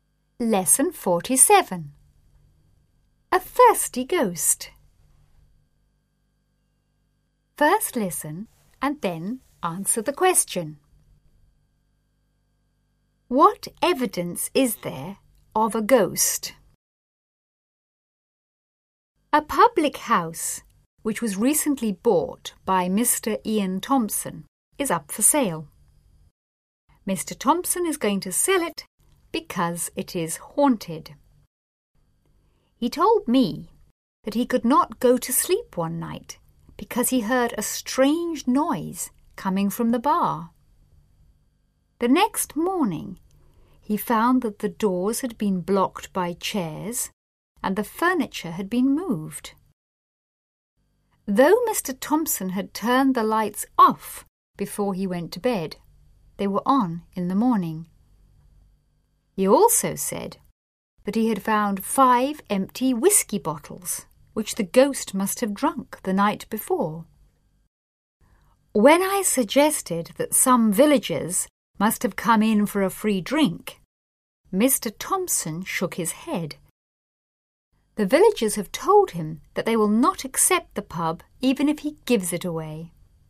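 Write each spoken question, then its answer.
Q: What evidence is there of a ghost?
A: Strange noises from the bar, doors blocked by chairs, furniture moved, lights turned on, and five empty whisky bottles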